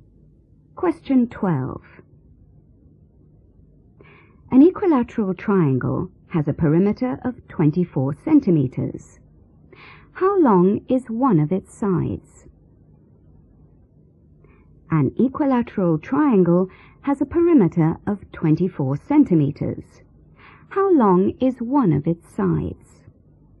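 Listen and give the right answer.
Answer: 8 centimetres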